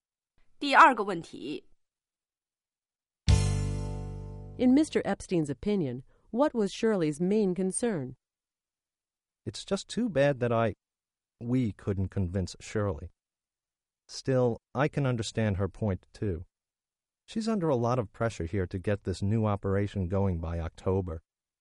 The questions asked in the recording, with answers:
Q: In Mr. Epstein's opinion, what was Shirley's main concern?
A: He felt that her main concern was the October deadline.